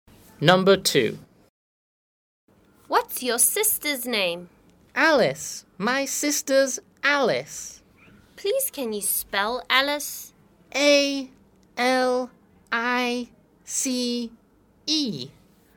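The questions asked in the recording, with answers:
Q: What's your sister's name?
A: Alice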